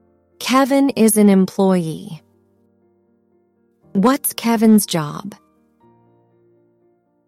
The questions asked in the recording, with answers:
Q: What's Kevin's job?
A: An employee.